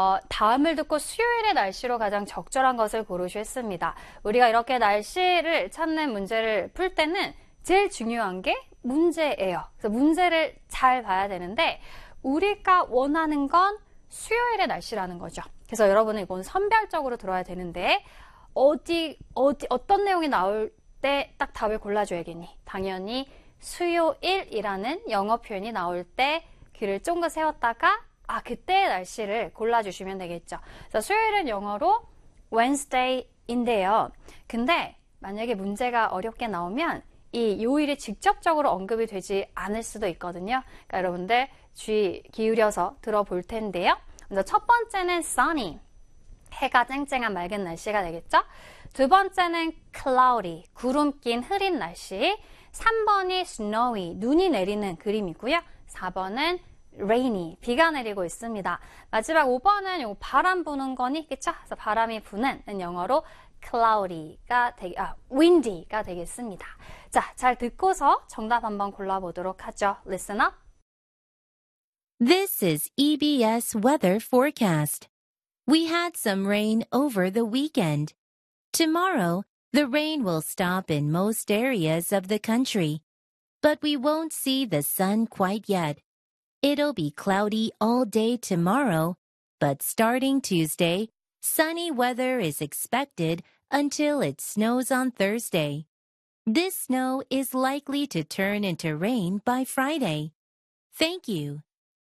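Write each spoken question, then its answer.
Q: 다음을 듣고 수요일의 날씨로 가장 적절한 것을 고르시겠습니다.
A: 1: sunny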